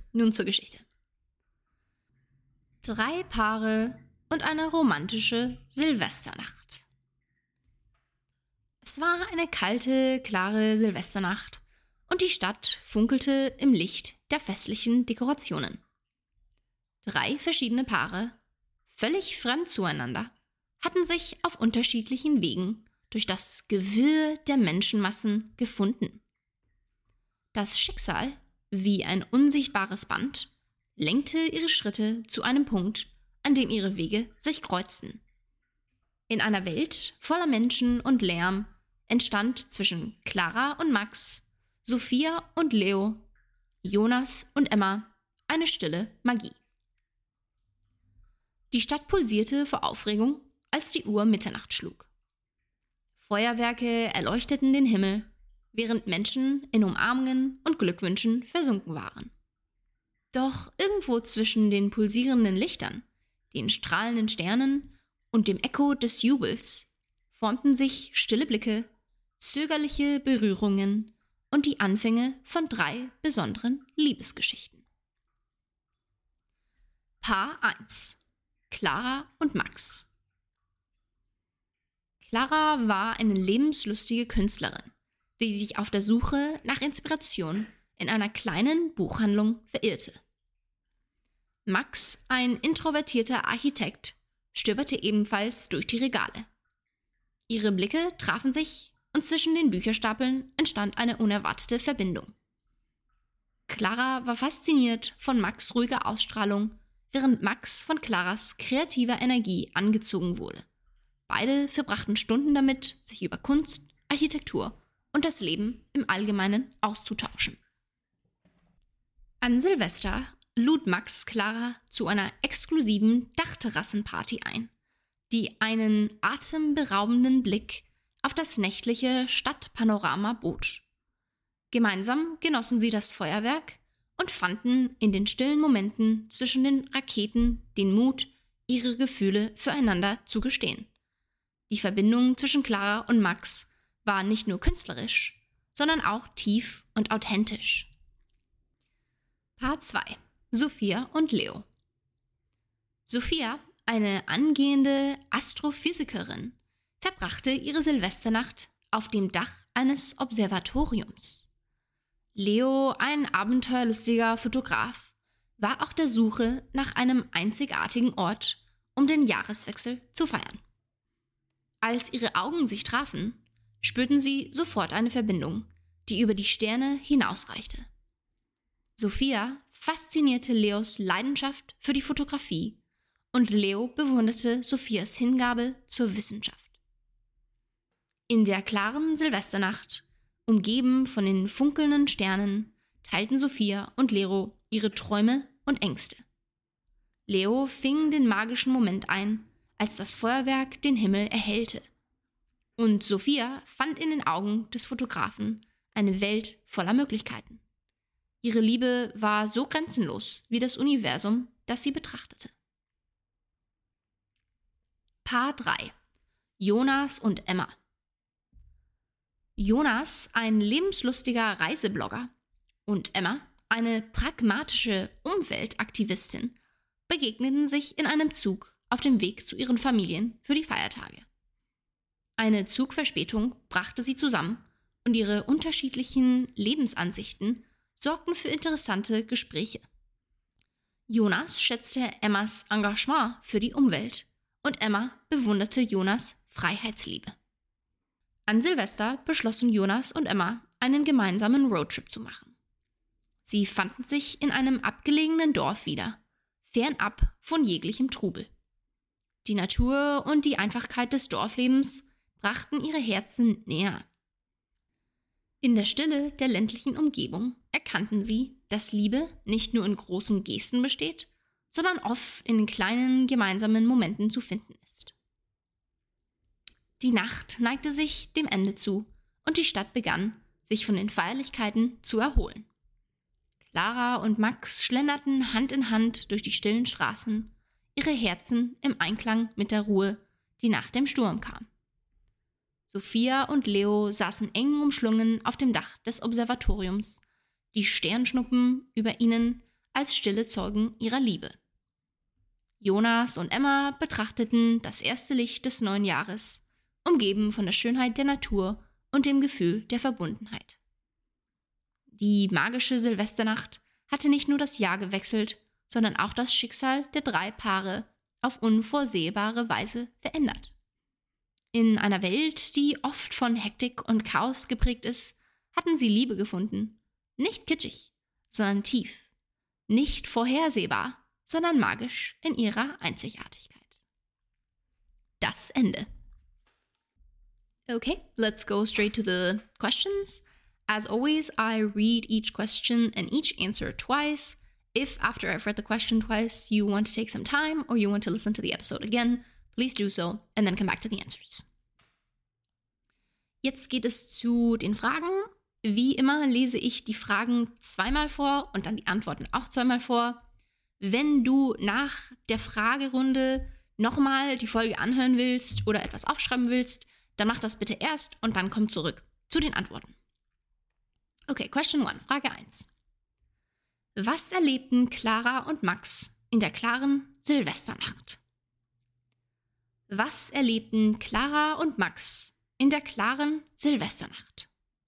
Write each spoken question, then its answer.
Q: Was erlebten Clara und Max in der klaren Silvesternacht?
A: Clara und Max gingen gemeinsam zu der exklusiven Dachterrassenparty und schlenderten dann Hand in Hand durch die stillen Straßen und genossen die Ruhe der klaren Silvesternacht.